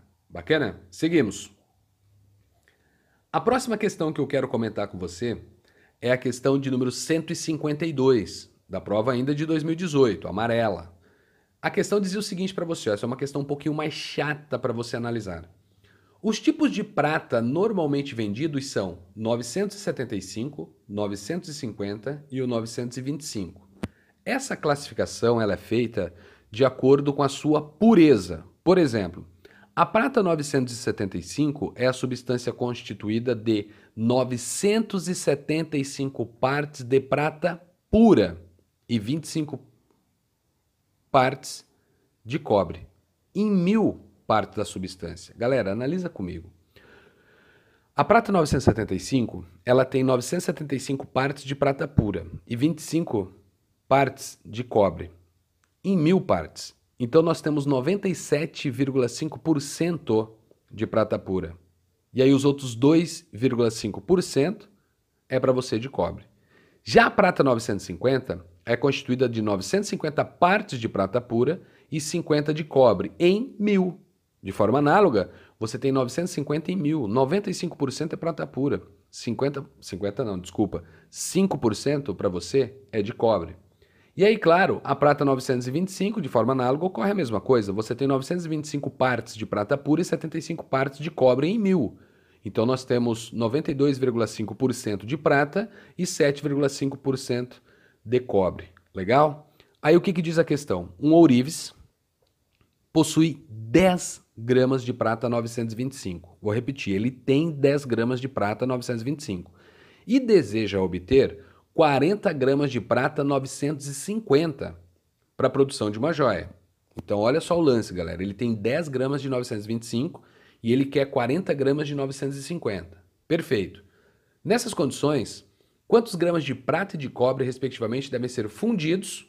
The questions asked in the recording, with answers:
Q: Nessas condições, quantos gramas de prata e de cobre, respectivamente, devem ser fundidos?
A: Então a resposta para você está na letra B, onde diz 28,75 gramas de prata e 1,25 gramas de cobre.